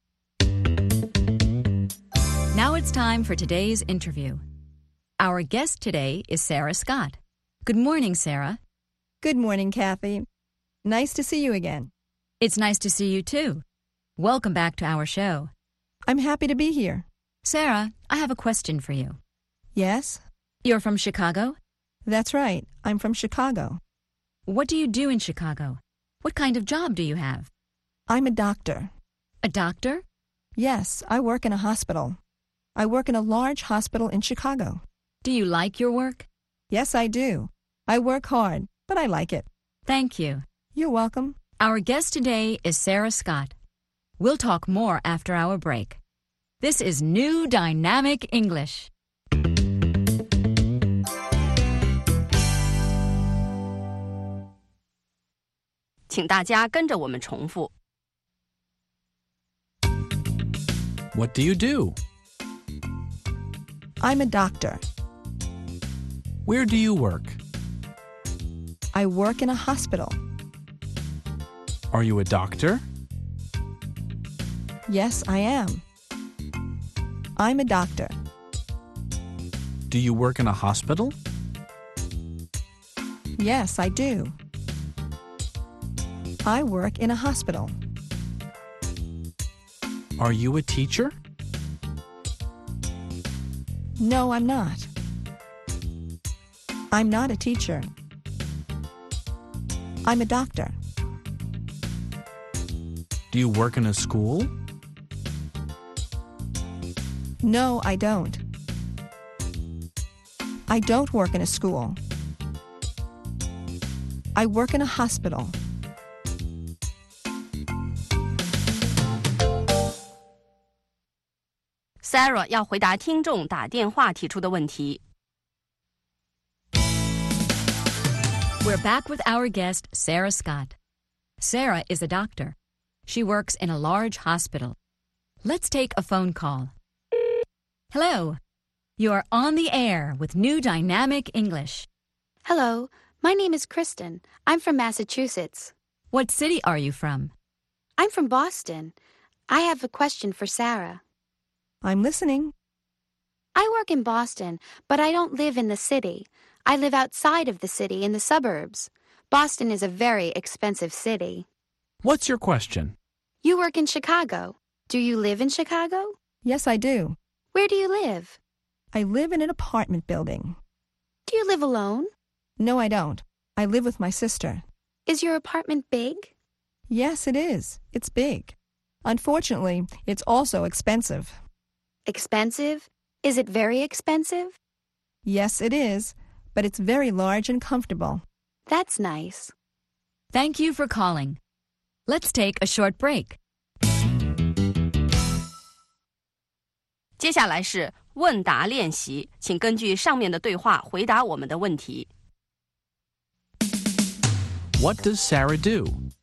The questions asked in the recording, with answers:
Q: What does Sarah do?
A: She's a doctor.